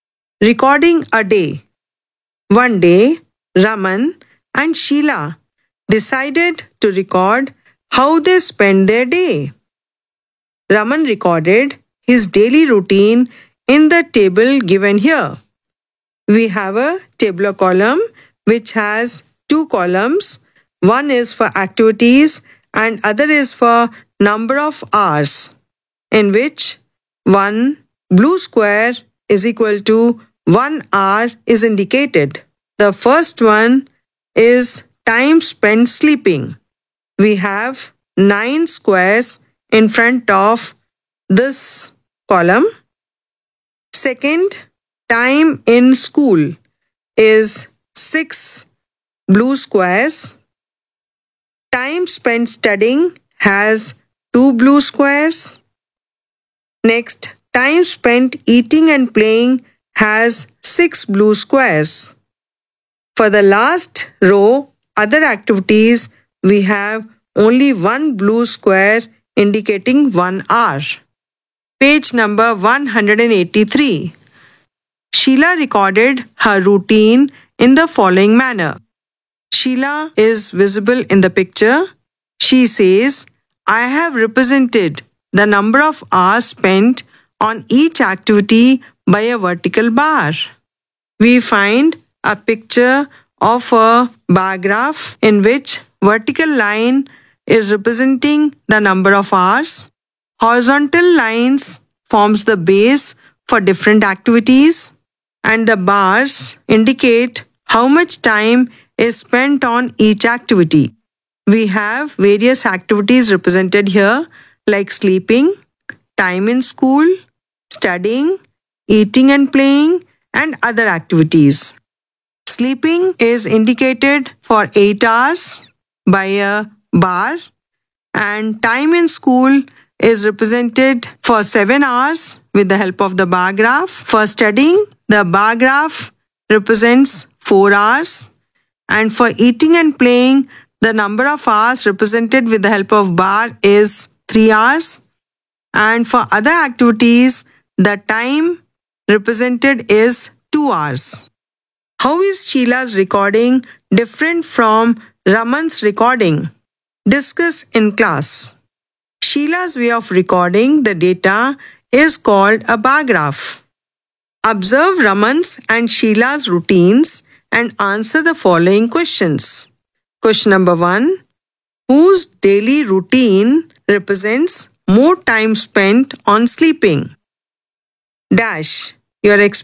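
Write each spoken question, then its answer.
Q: whose daily routine represents more time spent on sleeping?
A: Raman's (9 hours)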